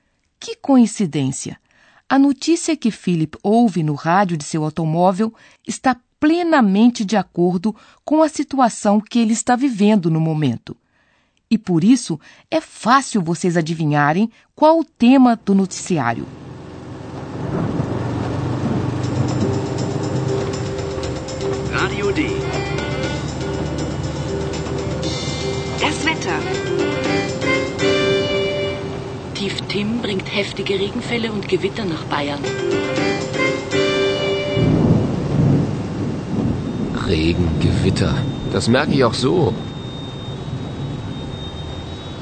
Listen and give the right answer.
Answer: Ele pegou o noticiário na hora da previsão do tempo.